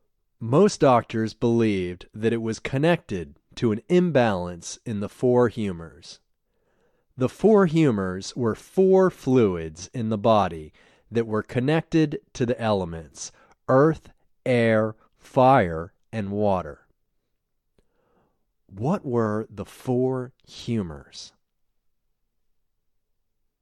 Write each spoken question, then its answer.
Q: What were the four humors?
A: The four humors were four fluids in the body.